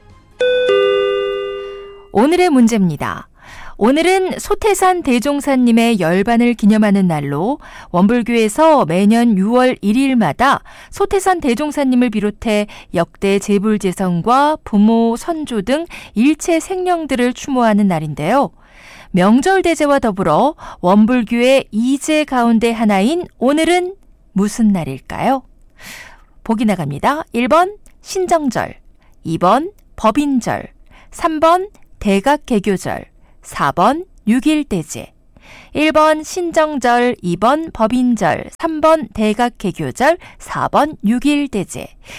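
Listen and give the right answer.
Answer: 4: 6.1대제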